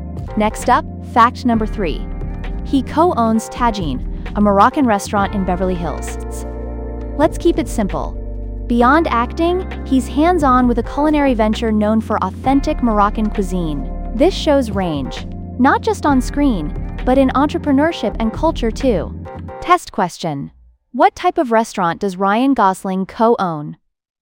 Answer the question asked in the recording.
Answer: Correct answer, Moroccan.